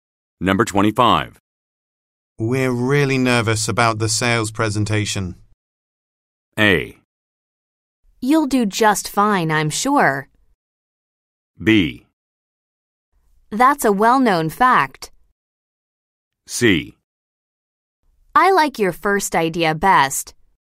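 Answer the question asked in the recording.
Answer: A: You'll do just fine, I'm sure.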